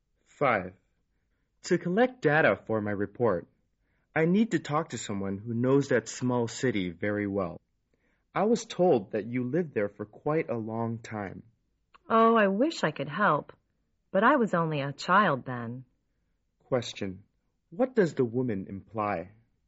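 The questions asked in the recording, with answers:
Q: What does the woman imply?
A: She can't help because she was only a child when she lived there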